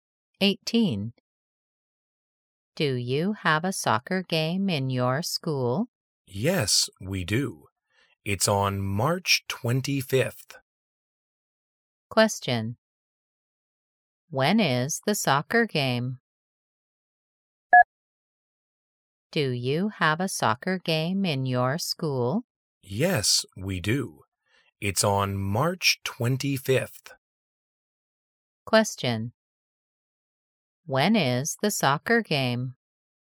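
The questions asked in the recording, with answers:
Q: When is the soccer game?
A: March 25th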